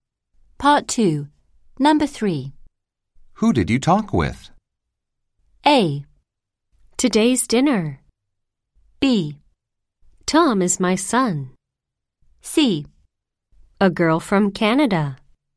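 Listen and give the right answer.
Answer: C: A girl from Canada.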